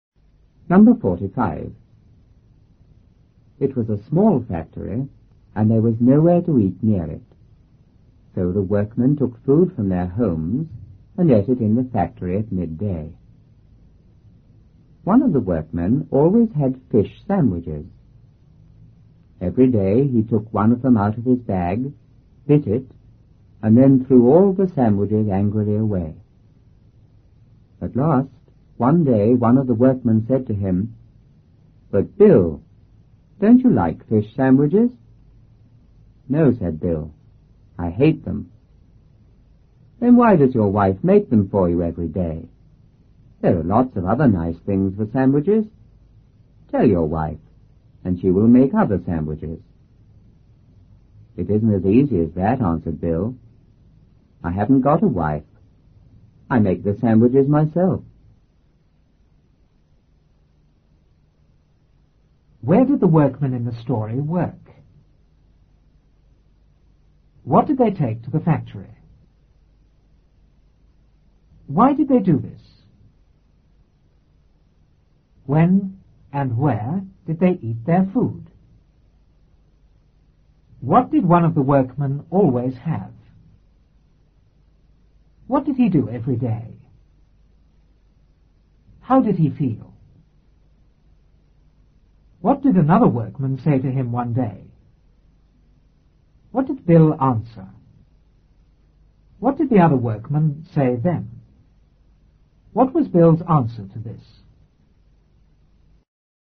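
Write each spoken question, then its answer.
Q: Where did the workmen in the story work?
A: In a small factory

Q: What did they take to the factory?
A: Food from their homes

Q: Why did they do this?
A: There was nowhere to eat near the factory

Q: When and where did they eat their food?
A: At midday in the factory

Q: What did one of the workmen always have?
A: Fish sandwiches

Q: What did he do every day?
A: He took one out, bit it, and threw all the sandwiches away angrily

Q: How did he feel?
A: Angry

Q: What did another workman say to him one day?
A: "But Bill, don't you like fish sandwiches?"

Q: What did Bill answer?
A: "No, I hate them."

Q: What did the other workman say then?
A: Why does your wife make them every day? Tell her and she will make other sandwiches.

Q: What was Bill's answer to this?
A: He hasn't got a wife; he makes the sandwiches himself.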